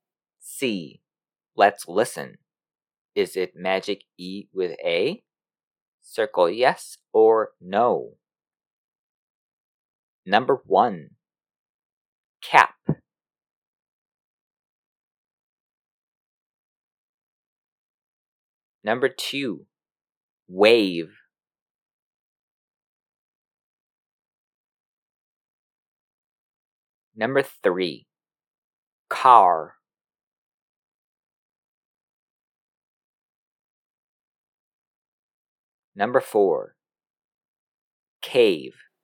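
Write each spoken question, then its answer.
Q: Wave.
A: yes

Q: Cave.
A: yes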